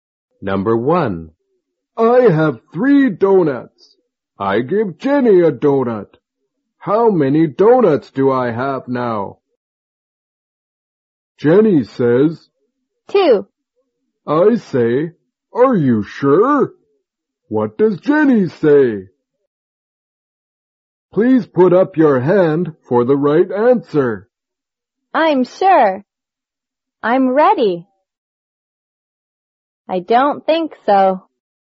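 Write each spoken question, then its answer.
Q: What does Jenny say?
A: I'm sure.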